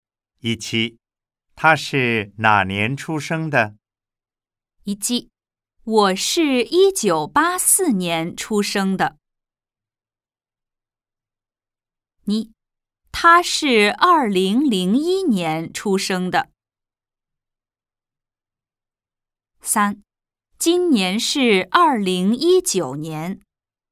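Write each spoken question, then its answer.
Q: 他是哪年出生的?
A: 2: 他是2001年出生的。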